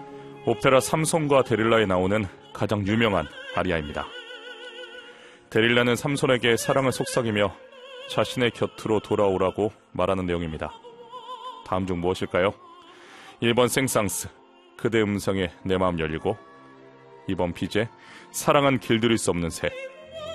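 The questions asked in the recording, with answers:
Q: 다음 중 무엇일까요? 1번 생상스, 그대 음성에 내 마음 열리고, 2번 피제, 사랑은 길들일 수 없는 새.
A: 1: 생상스, 그대 음성에 내 마음 열리고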